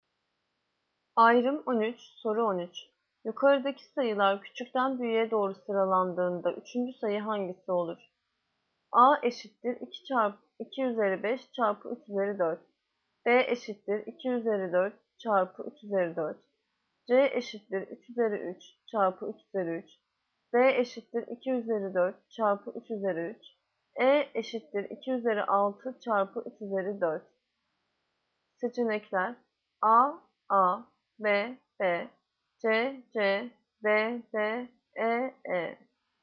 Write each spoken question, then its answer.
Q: Yukarıdaki sayılar küçükten büyüğe doğru sıralandığında üçüncü sayı hangisi olur?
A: Yanıt Bursa B. 2 çarpı 4, 2 üzeri 4 çarpı 3 üzeri 4.